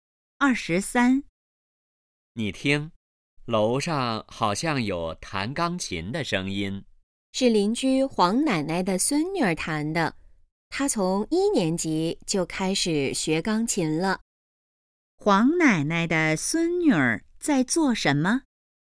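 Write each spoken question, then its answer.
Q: 黄奶奶的孙女儿在做什么?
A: 弹钢琴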